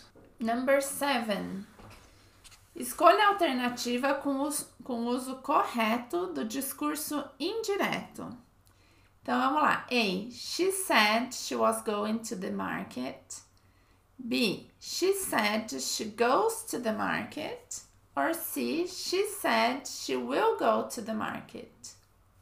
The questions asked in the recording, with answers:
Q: Escolha a alternativa com, o com uso correto do discurso indireto.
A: A. <laughs> She said she was going to the market.